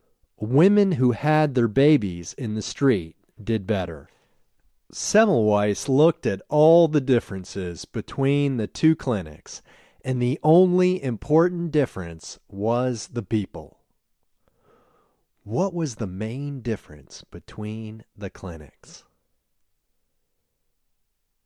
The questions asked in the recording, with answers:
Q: What was the main difference between the clinics?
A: The main difference between the clinics was the people.